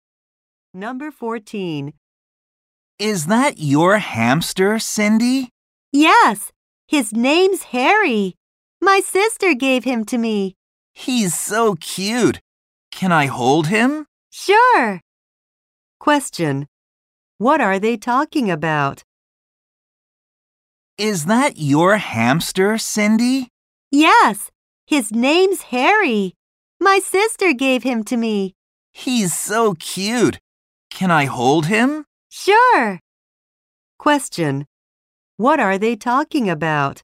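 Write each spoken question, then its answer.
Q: What are they talking about?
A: Cindy's hamster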